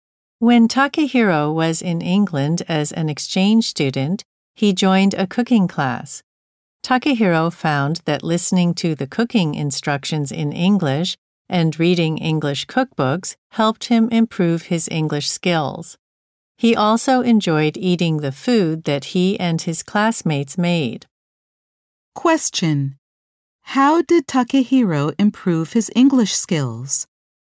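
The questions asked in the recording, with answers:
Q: How did Takehiro improve his English skills?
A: By listening to cooking instructions in English and reading English cookbooks in a cooking class.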